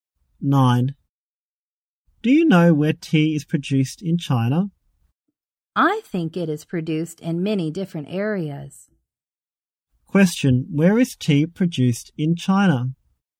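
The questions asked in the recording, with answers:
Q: Question, where is tea produced in China?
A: In many different areas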